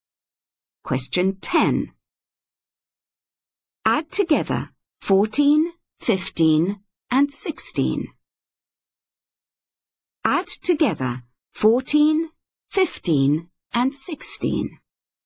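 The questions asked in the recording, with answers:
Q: Add together 14, 15, and 16.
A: 45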